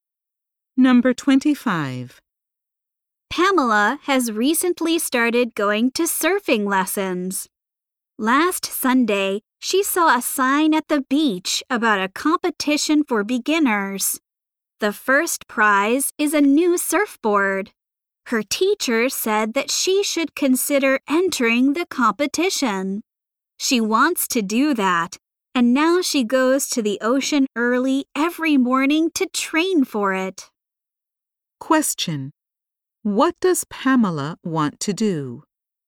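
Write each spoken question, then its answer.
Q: What does Pamela want to do?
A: Enter a surfing competition for beginners.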